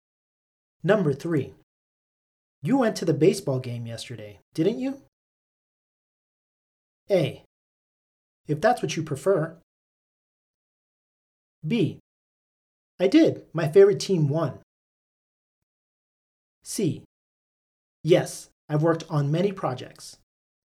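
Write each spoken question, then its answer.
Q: You went to the baseball game yesterday, didn't you?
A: B: I did. My favorite team won.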